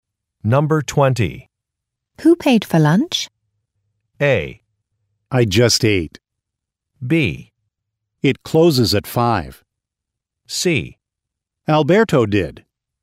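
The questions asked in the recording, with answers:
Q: Who paid for lunch?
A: C: Alberto did.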